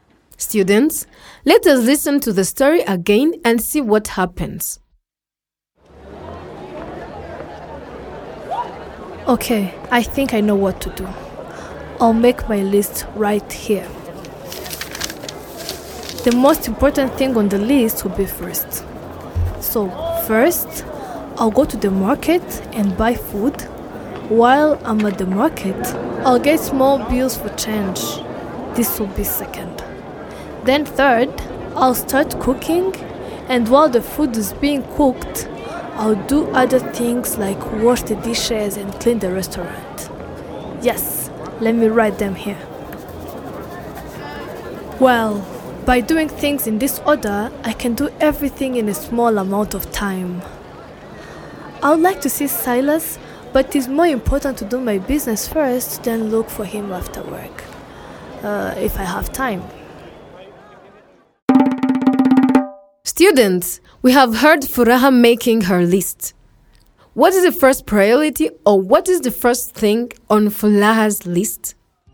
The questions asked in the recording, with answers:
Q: What is the first priority, or what is the first thing on Furaha's list?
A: You might have said the first thing on Furaha's list is to buy food at the market.